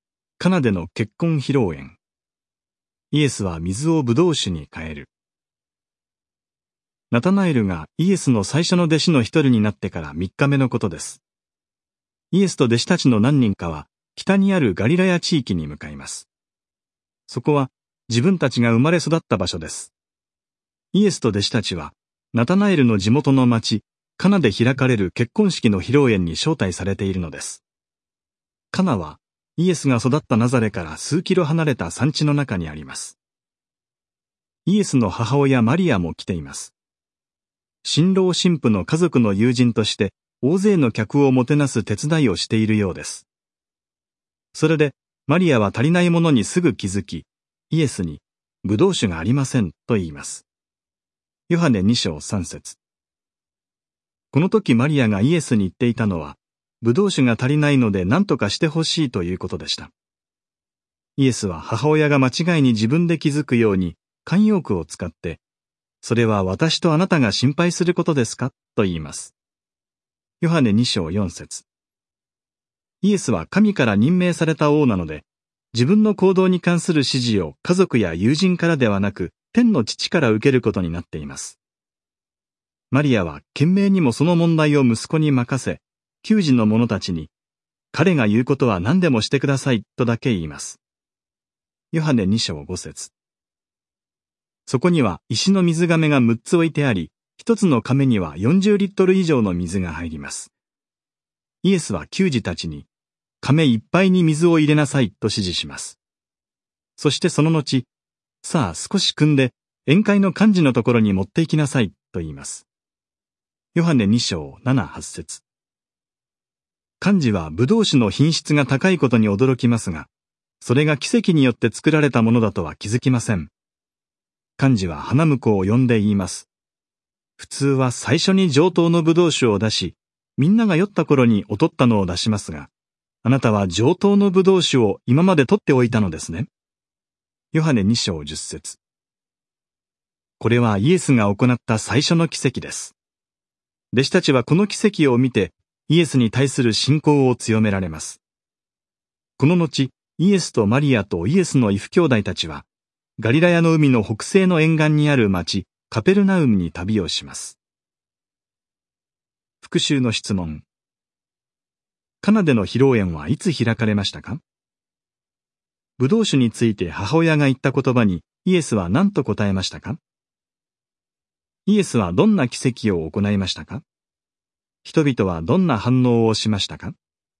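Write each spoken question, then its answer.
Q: カナでの披露宴はいつ開かれましたか?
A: ナタナエルがイエスの最初の弟子の一人になってから3日目

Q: ブドウ酒について母親が言った言葉にイエスは何と答えましたか?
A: それは私とあなたが心配することですか

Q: イエスはどんな奇跡を行いましたか?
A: 水をブドウ酒に変えた

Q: 人々はどんな反応をしましたか?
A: 幹事はブドウ酒の品質の高さに驚き、弟子たちは信仰を強められた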